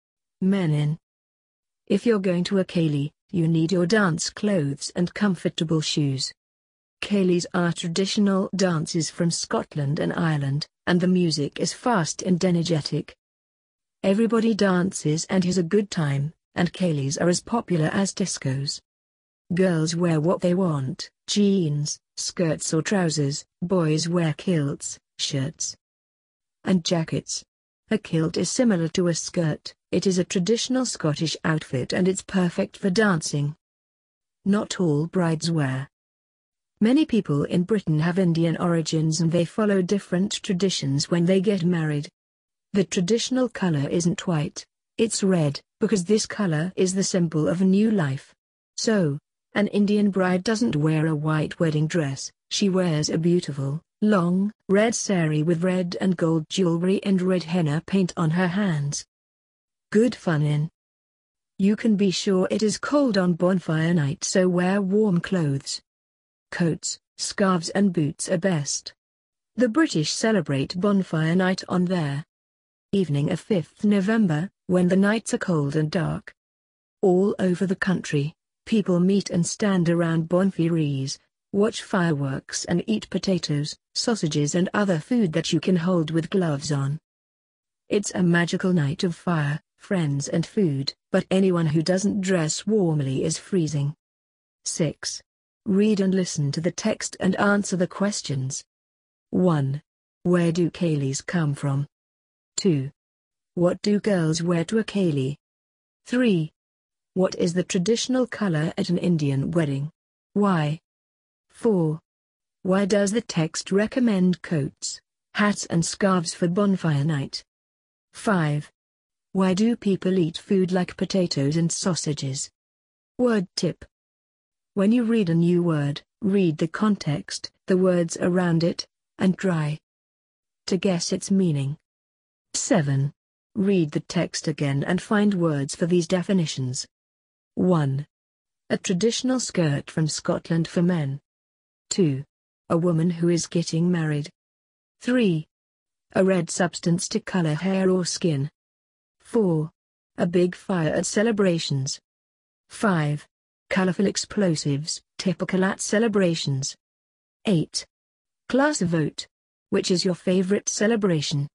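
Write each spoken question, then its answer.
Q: Where do Kalis come from?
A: Scotland and Ireland

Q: What do girls wear to a Kali?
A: What they want: jeans, skirts or trousers

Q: What is the traditional color at an Indian wedding?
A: Red, because it is the symbol of a new life

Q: Why does the text recommend coats, hats and scarves for bonfire night?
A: Because the nights are cold and dark

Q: Why do people eat food like potatoes and sausages?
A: Because you can hold them with gloves on

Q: A traditional skirt from Scotland for men.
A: kilt

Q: A woman who is getting married.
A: bride

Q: A red substance to color hair or skin.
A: henna

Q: A big fire at celebrations.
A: bonfire

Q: Colorful explosives, typical at celebrations.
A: fireworks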